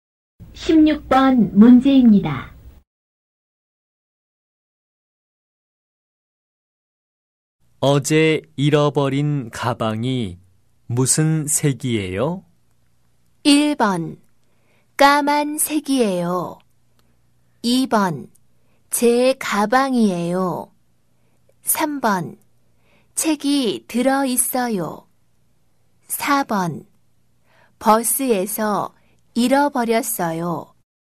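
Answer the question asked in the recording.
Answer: 1: 까만색이에요.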